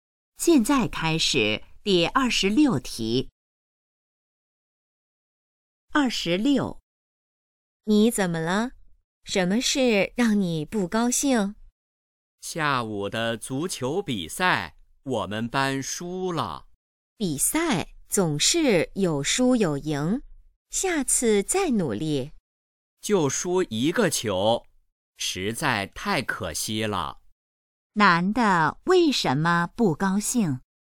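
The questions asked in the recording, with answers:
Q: 男的为什么不高兴?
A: 他们班足球比赛输了(只输了一个球)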